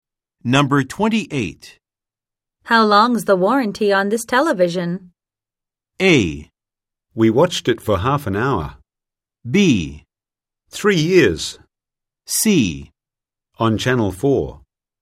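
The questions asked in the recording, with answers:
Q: How long's the warranty on this television?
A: B: Three years.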